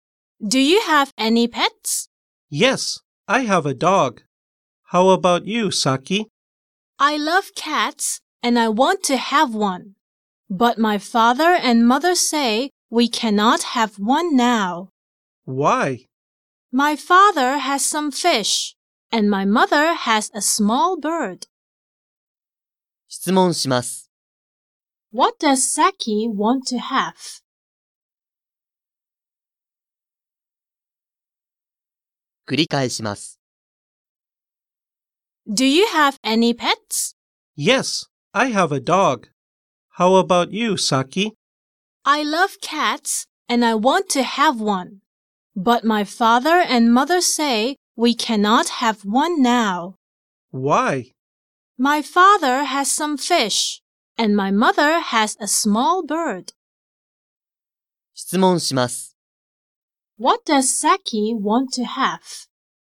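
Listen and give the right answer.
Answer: A cat.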